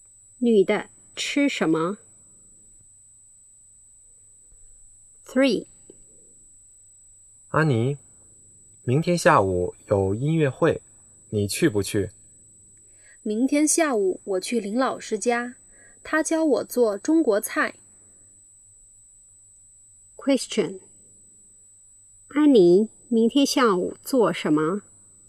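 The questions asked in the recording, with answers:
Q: 安妮明天下午做什么?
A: 去林老师家学做中国菜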